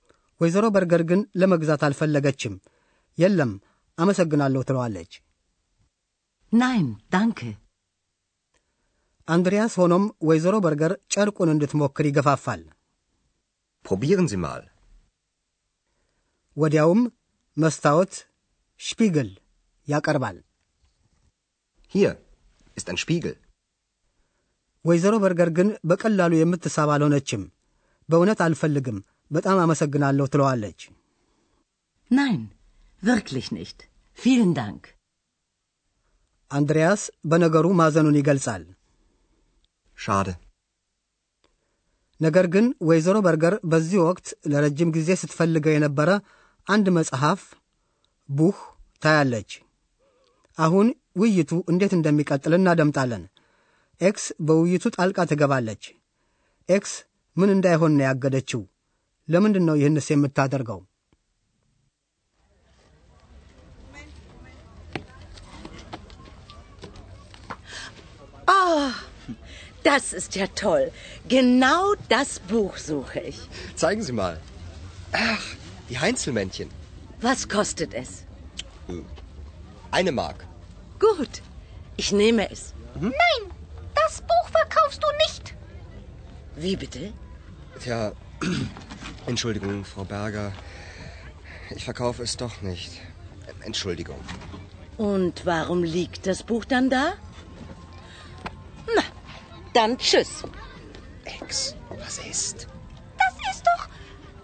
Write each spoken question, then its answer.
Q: ኤክስ ምን እንዳይሆን ነው ያገደችው?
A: ኤክስ አንድሪያስ ስለ በጎ መናፍስቱ ምስሎች የሚተርተውን የሃይንስል ሜንሽን መጽሐፍ እንዳይሸጥ ታደርገዋለች።